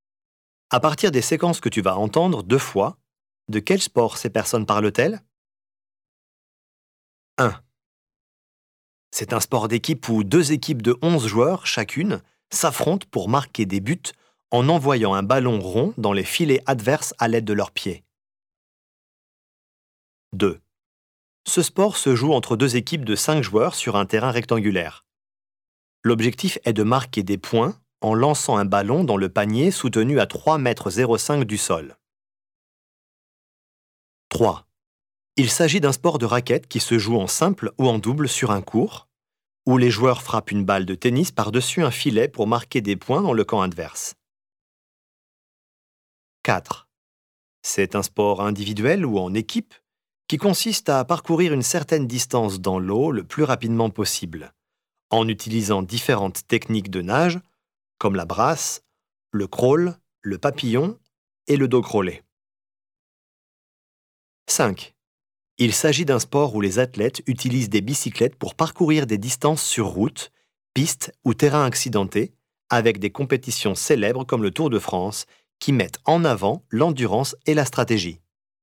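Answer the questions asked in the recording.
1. le football
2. le basket-ball
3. le tennis
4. la natation
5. le cyclisme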